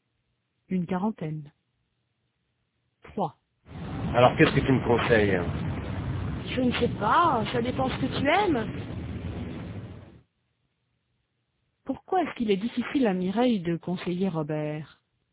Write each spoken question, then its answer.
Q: Pourquoi est-ce qu'il est difficile à Mireille de conseiller Robert?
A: Parce que ça dépend de ce qu'il aime.